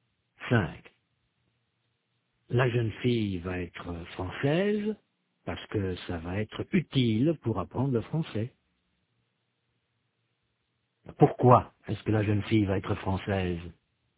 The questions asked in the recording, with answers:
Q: Pourquoi est-ce que la jeune fille va être française?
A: Parce que ça va être utile pour apprendre le français.